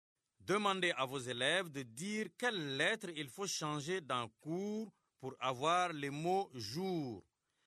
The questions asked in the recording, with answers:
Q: Demandez à vos élèves de dire quelle lettre il faut changer dans cours pour avoir le mot jour.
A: Monsieur, j'efface la lettre C et j'écris la lettre J.